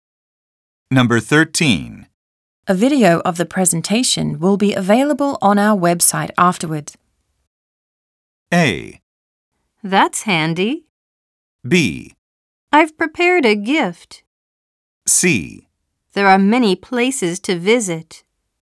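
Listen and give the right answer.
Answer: A: That's handy.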